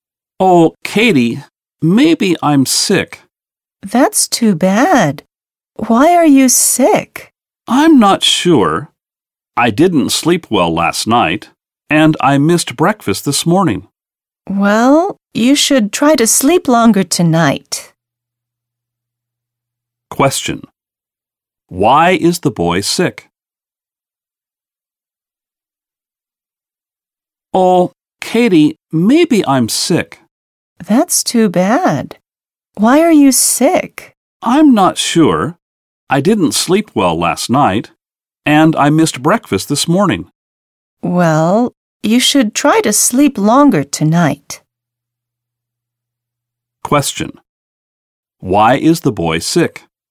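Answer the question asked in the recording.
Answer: He didn't sleep well and missed breakfast.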